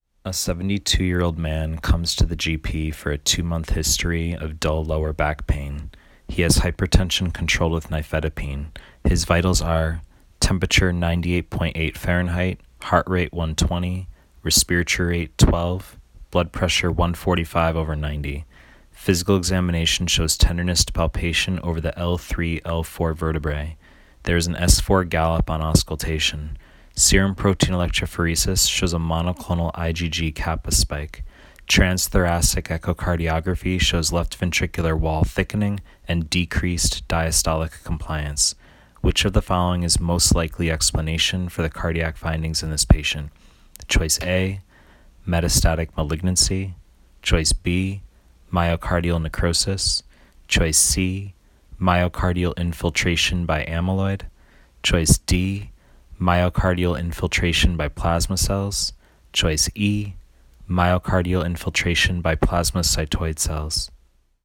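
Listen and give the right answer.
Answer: C: myocardial infiltration by amyloid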